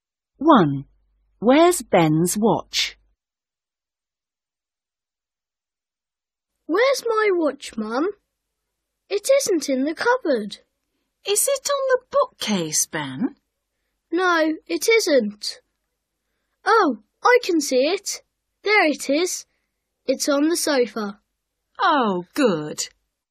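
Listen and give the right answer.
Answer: On the sofa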